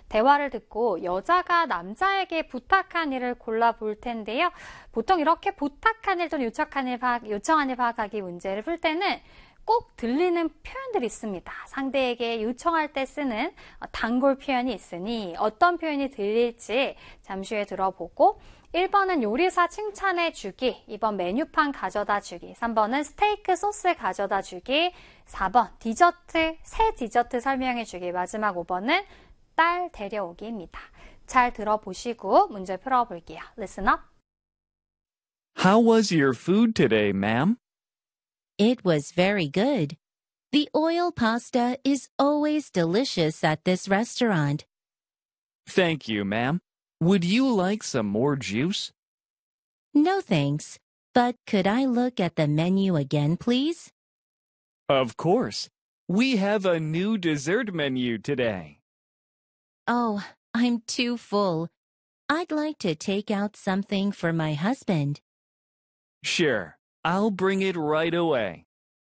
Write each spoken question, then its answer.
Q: 대화를 듣고 여자가 남자에게 부탁한 일을 골라볼 텐데요.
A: 메뉴판 가져다 주기. 요게 정답이었습니다.